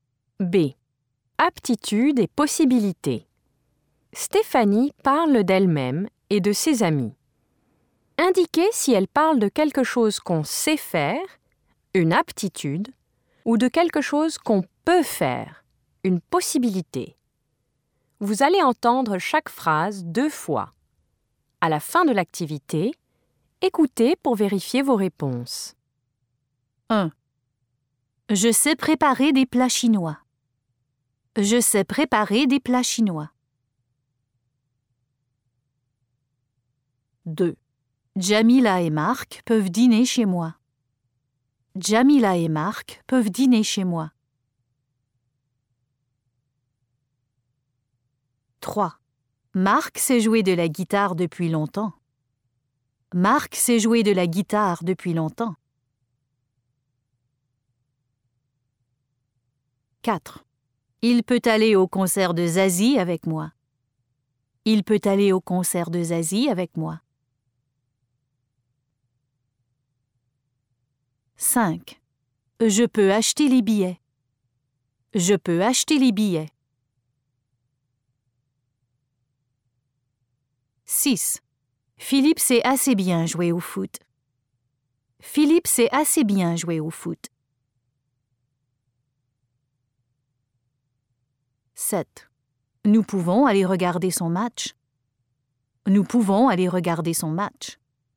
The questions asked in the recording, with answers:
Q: Je sais préparer des plats chinois.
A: Une aptitude.

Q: Jamila et Marc peuvent dîner chez moi.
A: 2. Une possibilité.

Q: Marc sait jouer de la guitare depuis longtemps.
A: 3. Une aptitude.

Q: Je peux acheter les billets.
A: 5. Une possibilité.

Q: Philippe sait assez bien jouer au foot.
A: 6. Une aptitude.

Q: Nous pouvons aller regarder son match.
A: 7. Une possibilité.